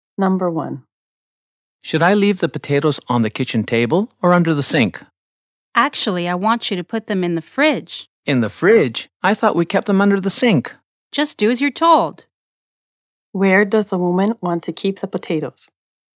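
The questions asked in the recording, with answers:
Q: Where does the woman want to keep the potatoes?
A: In the fridge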